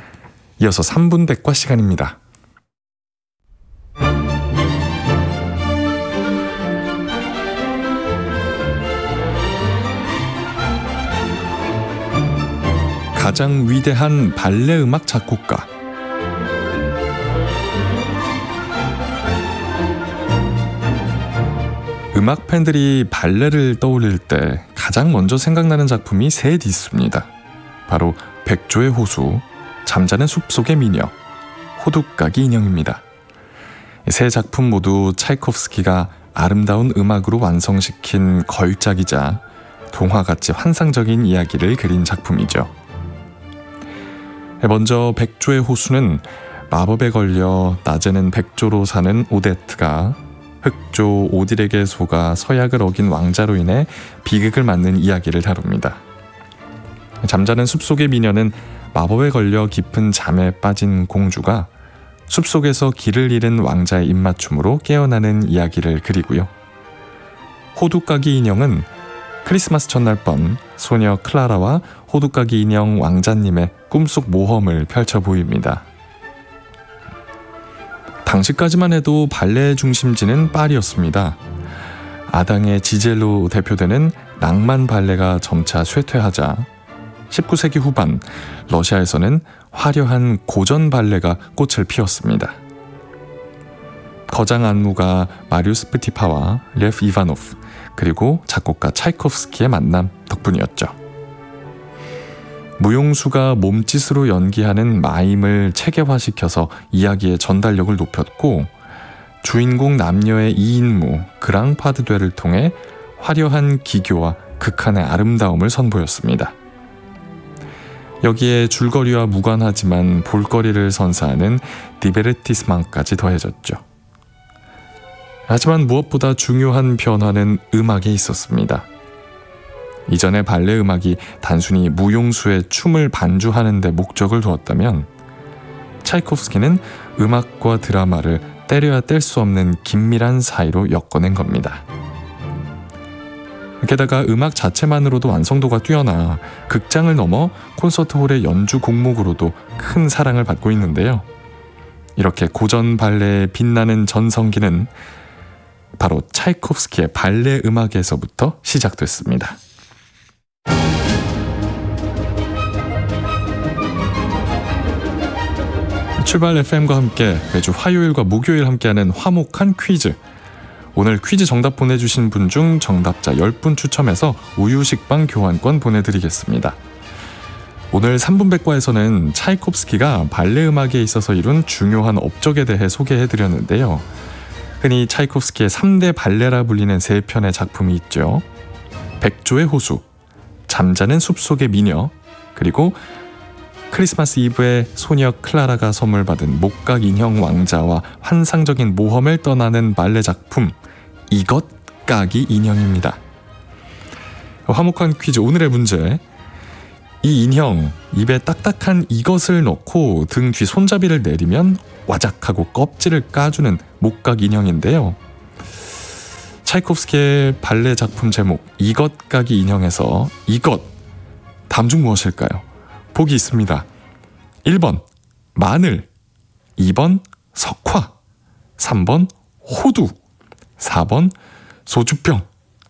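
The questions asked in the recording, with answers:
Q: 차이콥스키의 발레 작품 제목 이것 까기 인형에서 이것 다음 중 무엇일까요?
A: 3: 호두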